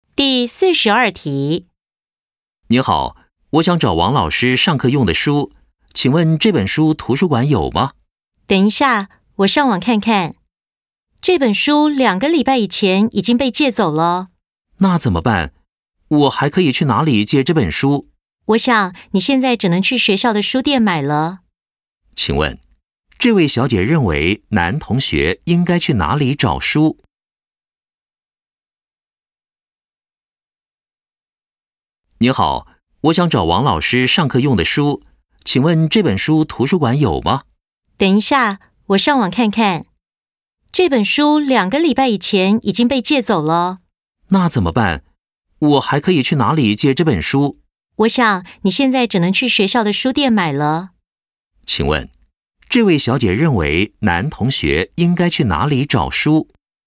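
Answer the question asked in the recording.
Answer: 学校的书店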